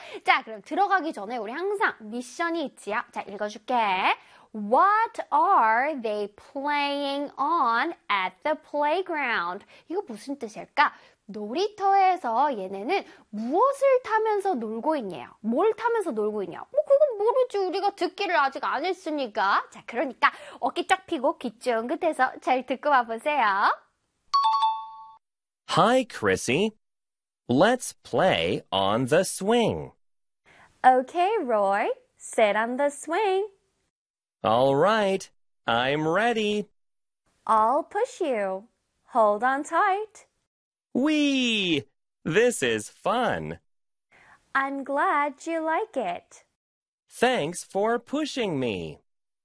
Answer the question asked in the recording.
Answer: 그래서 정답은 swing이 되겠습니다.